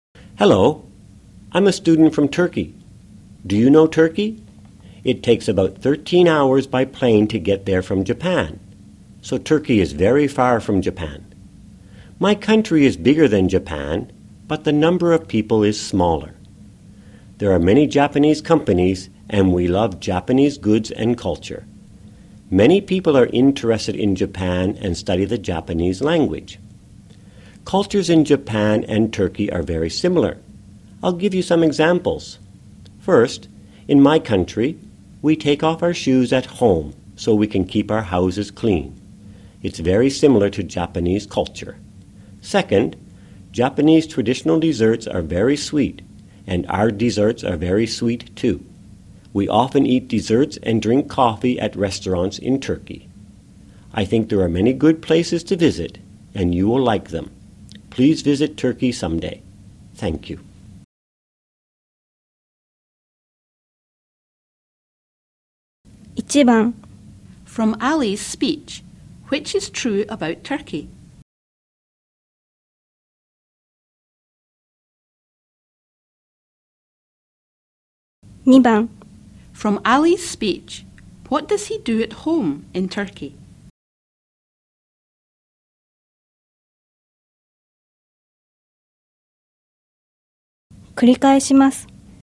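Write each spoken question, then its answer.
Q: From Ali's speech, what does he do at home in Turkey?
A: He takes off his shoes at home.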